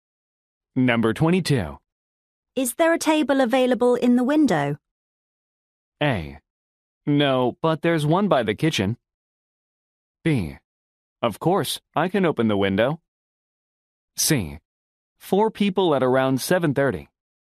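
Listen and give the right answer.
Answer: A: No, but there's one by the kitchen.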